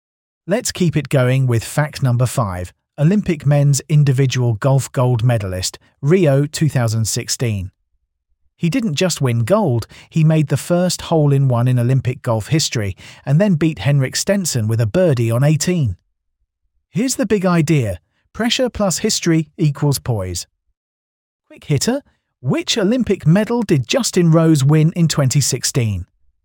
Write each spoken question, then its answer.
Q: which Olympic medal did Justin Rose win in 2016?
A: Correct answer, gold.